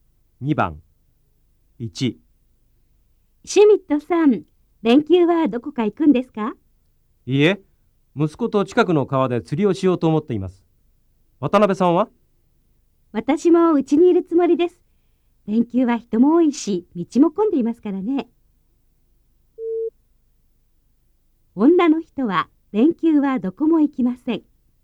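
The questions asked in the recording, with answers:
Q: 女の人は連休はどこも行きません。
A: ○(正しい)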